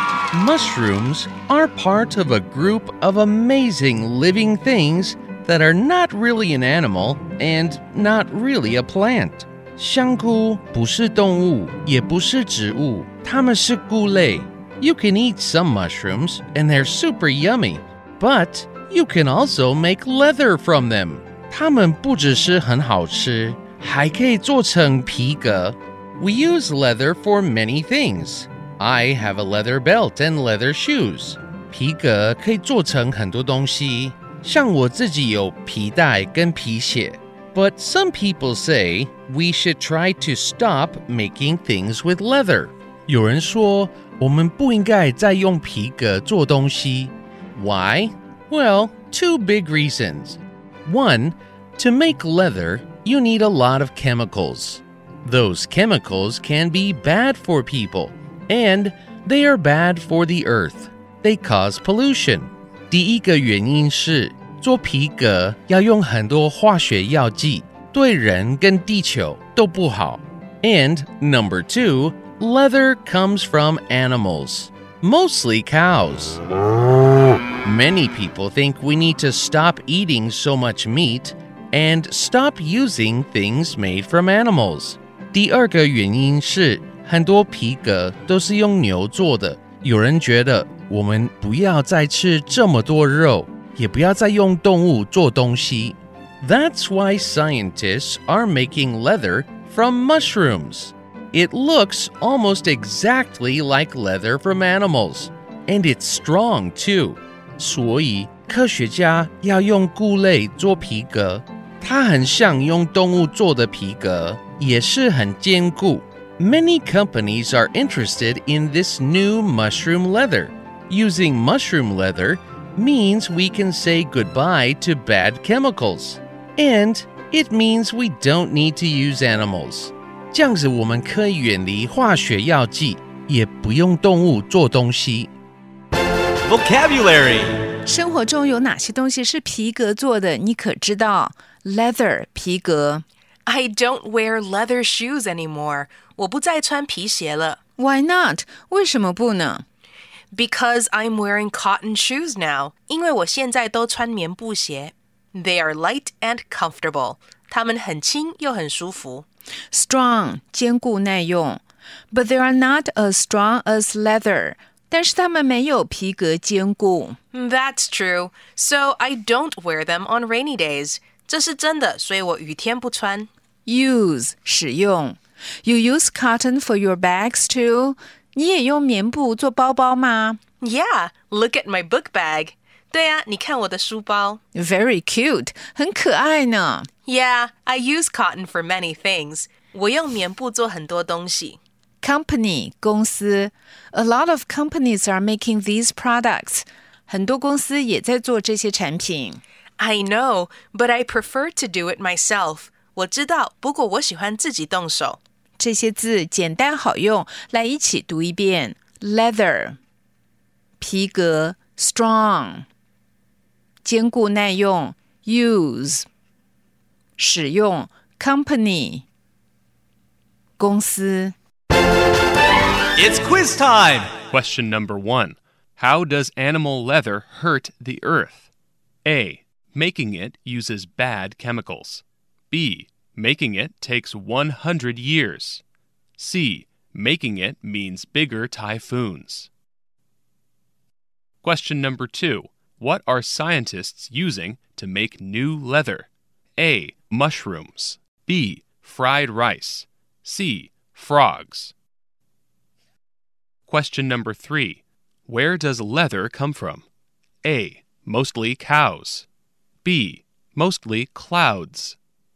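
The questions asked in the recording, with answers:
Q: How does animal leather hurt the earth?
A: A: Making it uses bad chemicals.

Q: What are scientists using to make new leather?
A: A: Mushrooms.

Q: Where does leather come from?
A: A: Mostly cows.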